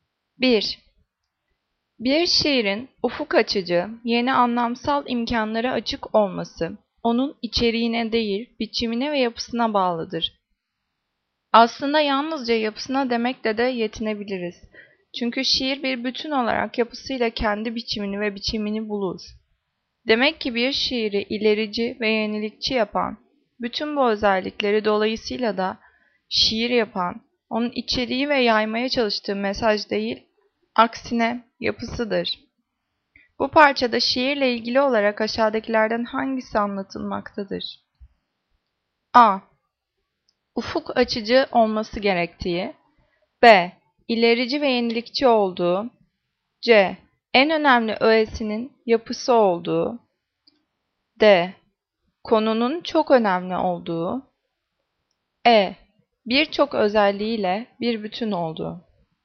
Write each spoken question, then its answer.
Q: Bu parçada şiirle ilgili olarak aşağıdakilerden hangisi anlatılmaktadır?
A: Cevap C. En önemli öğesinin yapısı olduğu.